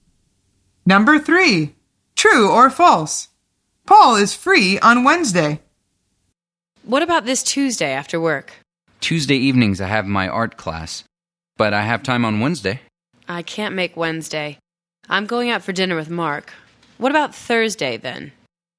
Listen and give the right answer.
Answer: The answer is true. Paul says, I have time on Wednesday.